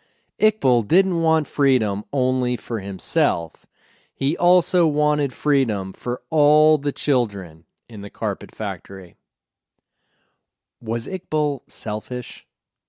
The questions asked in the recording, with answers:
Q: Was Iqbal selfish?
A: No, Iqbal wasn't selfish.